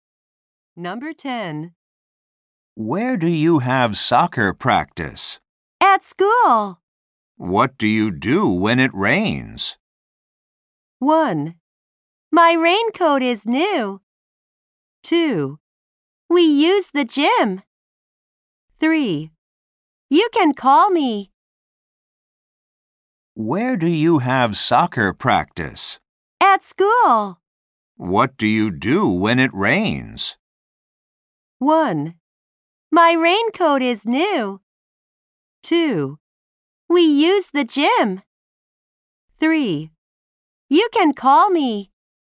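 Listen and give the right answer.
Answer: 2: We use the gym.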